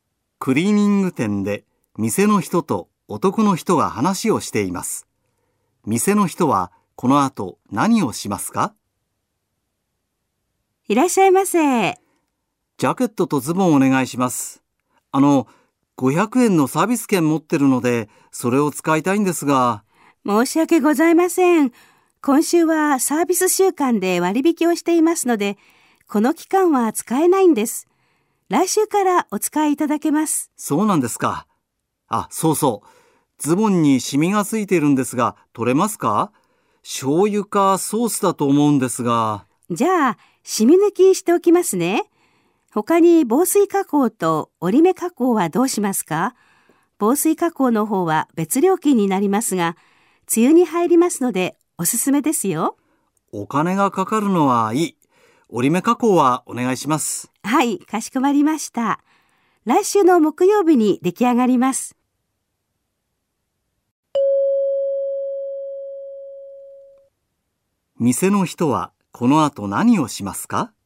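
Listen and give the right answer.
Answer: ズボンのシミ抜きと折り目加工をする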